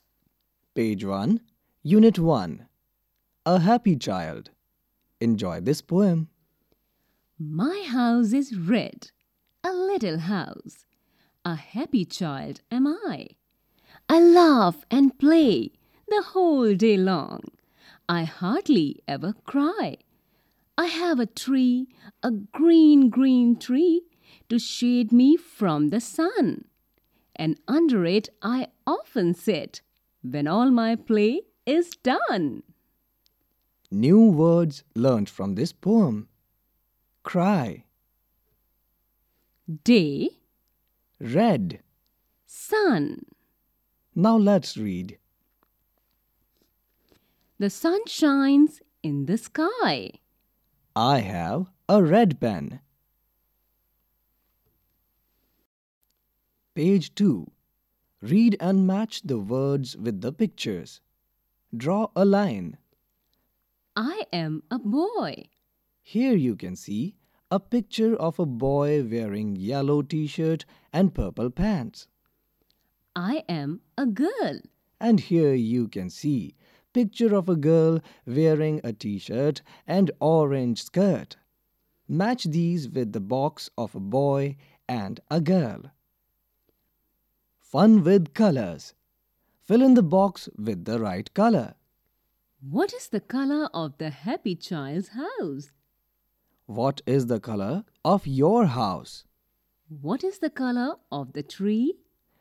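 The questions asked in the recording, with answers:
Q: What is the color of the happy child's house?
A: red

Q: What is the color of the tree?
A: green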